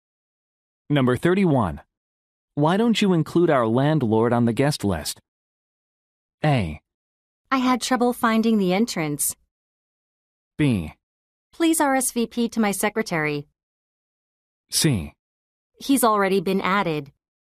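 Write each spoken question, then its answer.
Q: Why don't you include our landlord on the guest list?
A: C: He's already been added.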